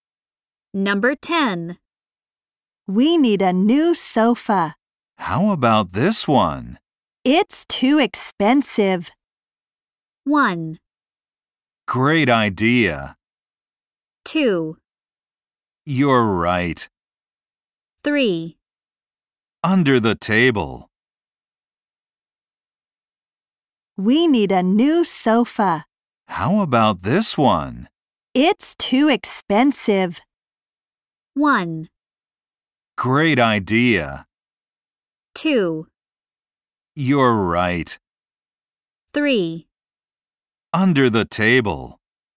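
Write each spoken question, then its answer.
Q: It's too expensive.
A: 2: You're right.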